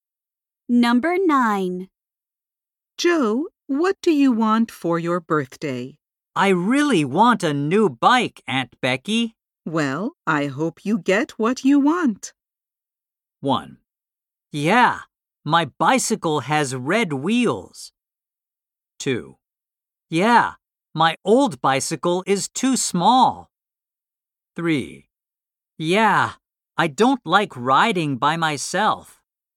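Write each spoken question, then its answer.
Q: Well, I hope you get what you want.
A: 2: Yeah, my old bicycle is too small.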